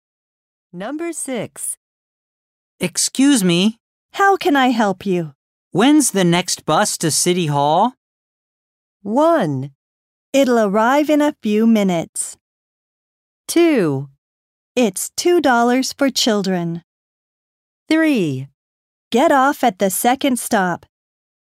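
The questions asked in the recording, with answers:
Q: When's the next bus to City Hall?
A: 1: It'll arrive in a few minutes.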